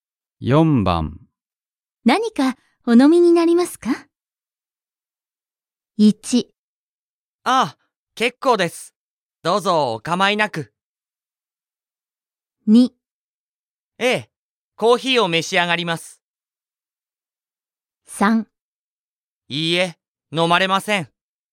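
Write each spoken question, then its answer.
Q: 何かお飲みになりますか?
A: 1: ああ、結構です。どうぞお構いなく。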